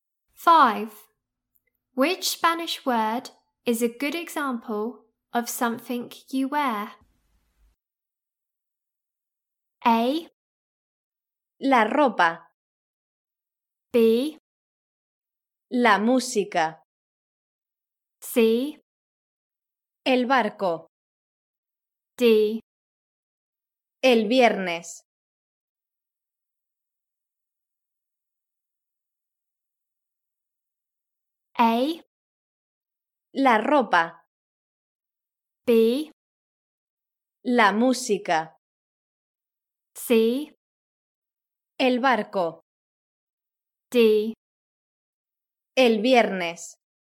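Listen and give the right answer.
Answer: A: La ropa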